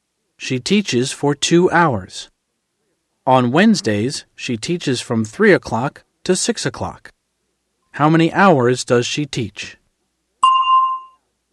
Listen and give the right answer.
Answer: She teaches for 3 hours.